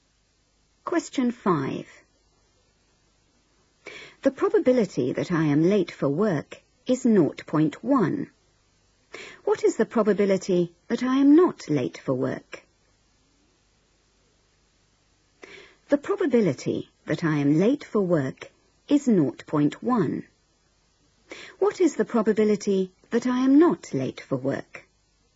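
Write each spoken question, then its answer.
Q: What is the probability that I am not late for work?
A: 0.9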